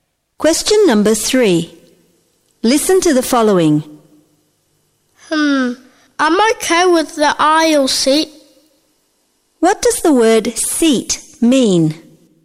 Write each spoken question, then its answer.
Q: What does the word seat mean?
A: Kata seat berarti tempat duduk.